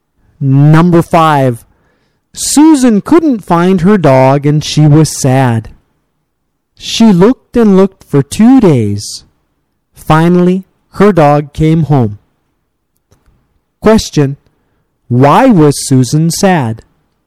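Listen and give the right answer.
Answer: She couldn't find her dog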